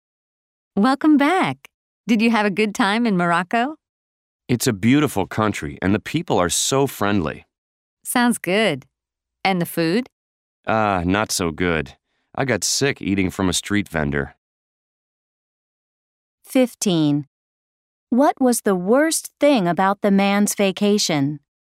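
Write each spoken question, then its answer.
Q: What was the worst thing about the man's vacation?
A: The food; he got sick eating from a street vendor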